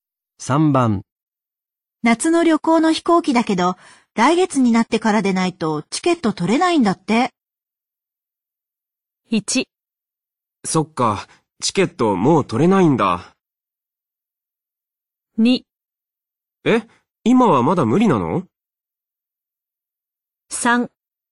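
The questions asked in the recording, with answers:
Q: 夏の旅行の飛行機だけど、来月になってからでないとチケット取れないんだって。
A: 2: え、今はまだ無理なの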